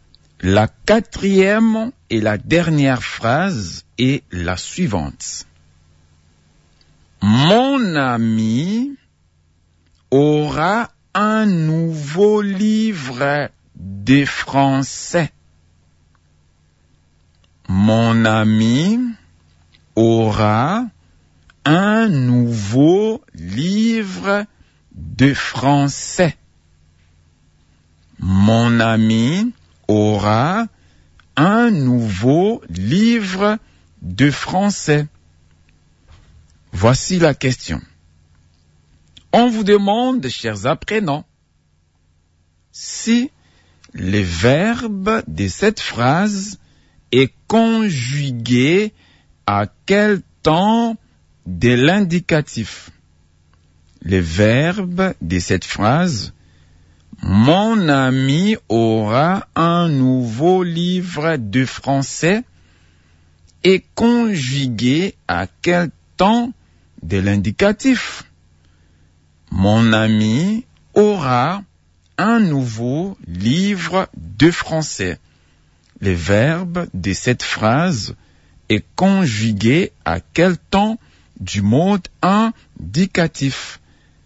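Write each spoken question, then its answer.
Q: Le verbe de cette phrase est conjugué à quel temps du mode indicatif?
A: Au futur simple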